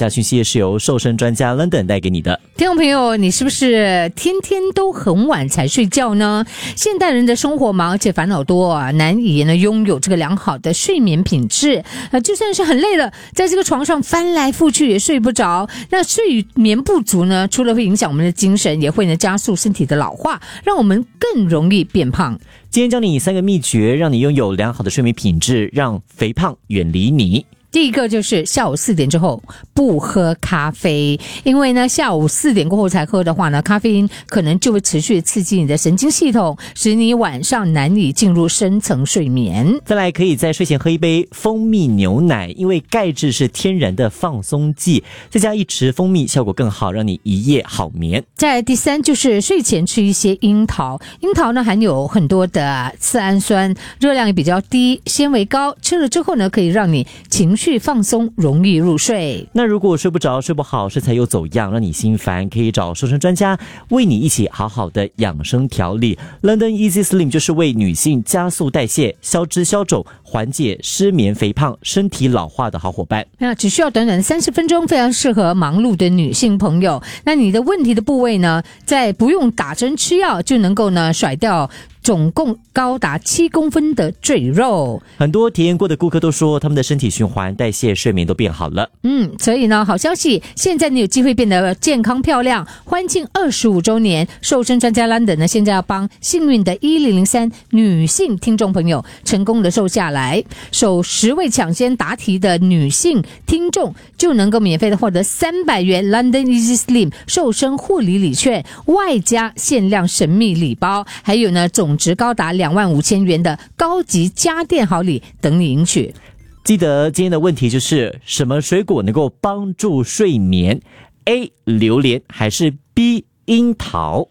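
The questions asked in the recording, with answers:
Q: 什么水果能够帮助睡眠? A 榴莲还是 B 樱桃?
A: B: 樱桃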